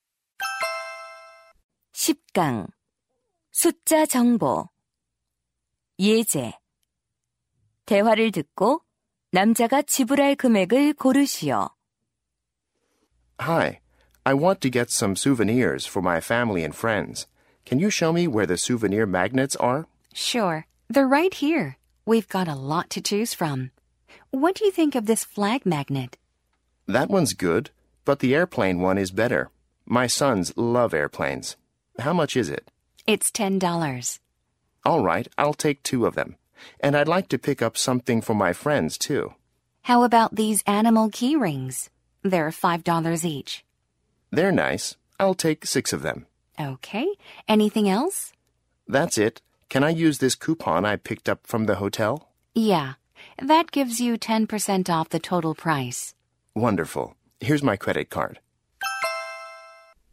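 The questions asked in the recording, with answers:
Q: 대화를 듣고 남자가 지불할 금액을 고르시오.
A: $45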